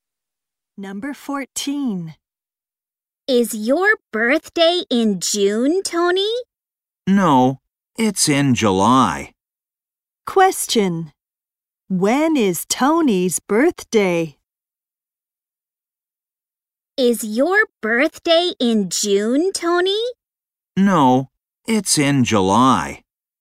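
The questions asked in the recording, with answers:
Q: When is Tony's birthday?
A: In July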